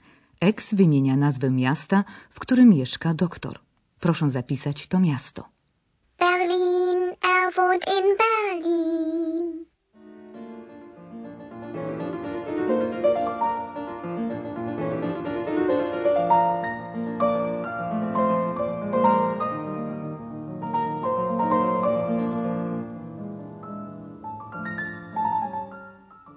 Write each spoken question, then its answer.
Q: Proszę zapisać to miasto.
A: Miasto doktora Thurmana to Berlin